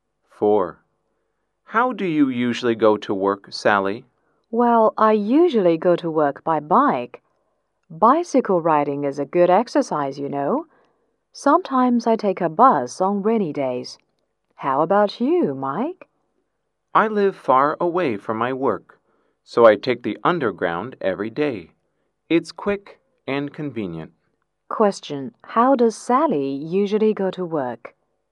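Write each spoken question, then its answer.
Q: How does Sally usually go to work?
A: By bike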